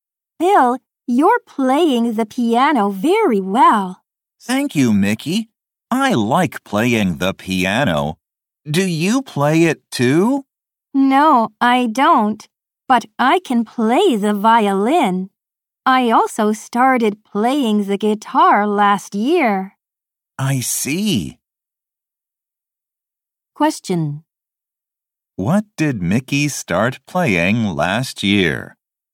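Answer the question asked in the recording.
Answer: The guitar.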